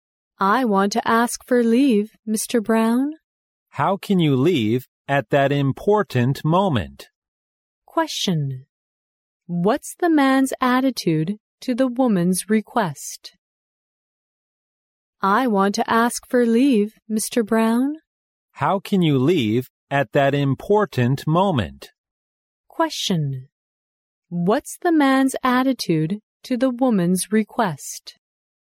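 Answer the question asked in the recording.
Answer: He disapproves of it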